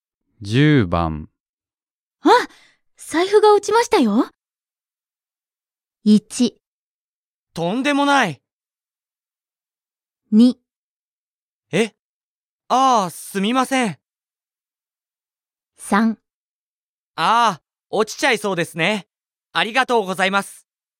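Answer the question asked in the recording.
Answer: 2: え、 ああ、すみません。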